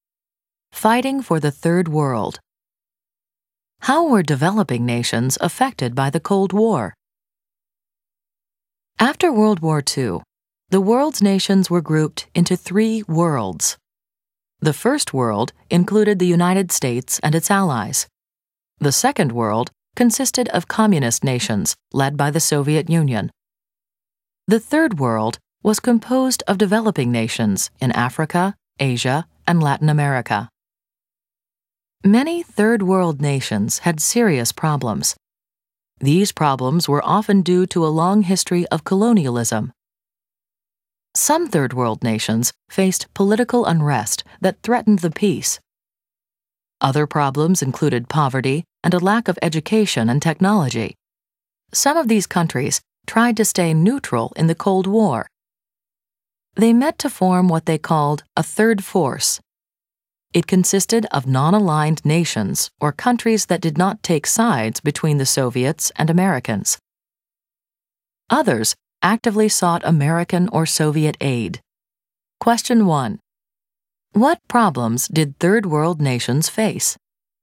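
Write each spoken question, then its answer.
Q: What problems did Third World nations face?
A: Political unrest, poverty, and a lack of education and technology, often due to a long history of colonialism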